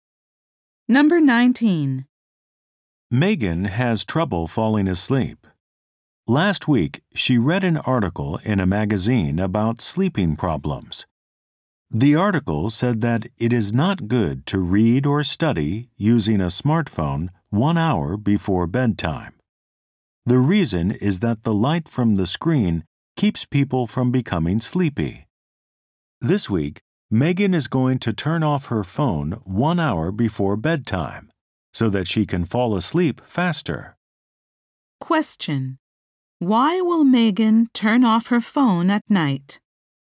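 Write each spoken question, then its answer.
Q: Why will Megan turn off her phone at night?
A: So that she can fall asleep faster.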